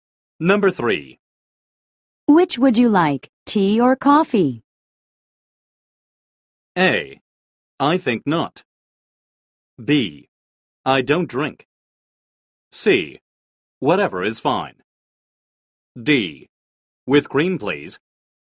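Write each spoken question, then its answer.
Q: Which would you like, tea or coffee?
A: C: Whatever is fine.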